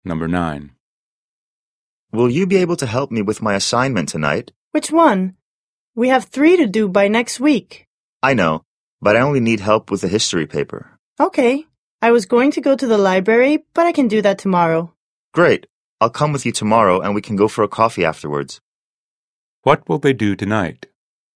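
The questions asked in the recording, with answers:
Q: What will they do tonight?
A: Work on the history assignment together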